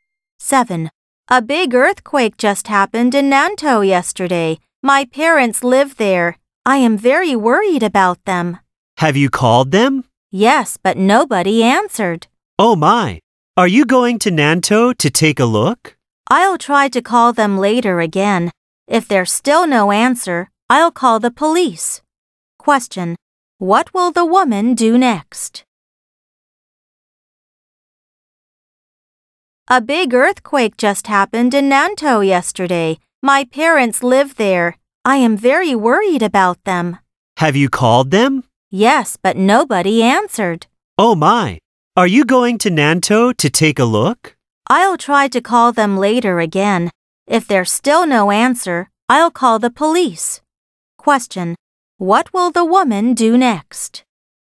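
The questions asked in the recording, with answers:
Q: What will the woman do next?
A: Try calling her parents again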